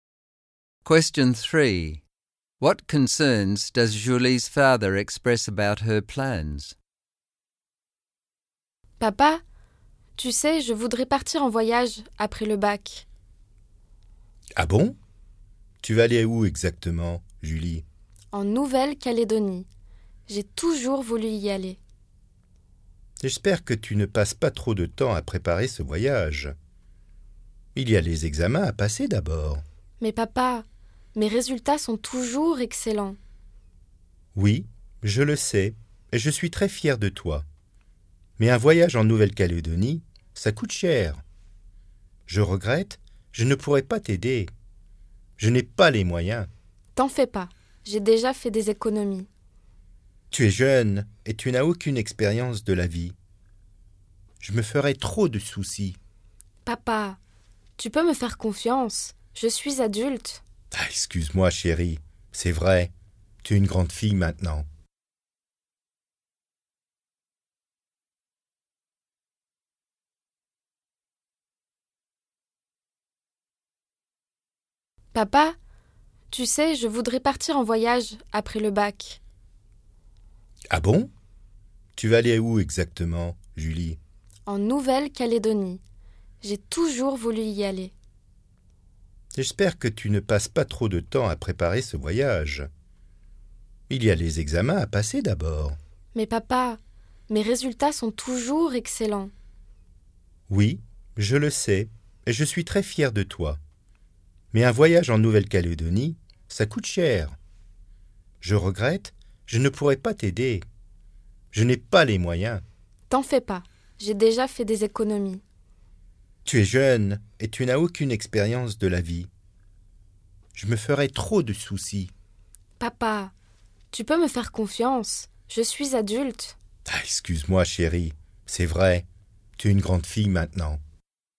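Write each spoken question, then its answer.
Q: What concerns does Julie's father express about her plans?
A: She might spend too much time planning the trip instead of preparing for her exams; the trip is expensive and he can't help pay for it; she is young and has no experience of life, so he would worry too much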